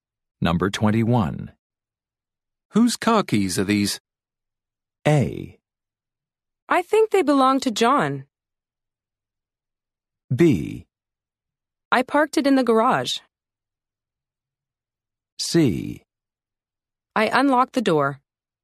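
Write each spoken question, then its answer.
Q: Whose car keys are these?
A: A: I think they belong to John.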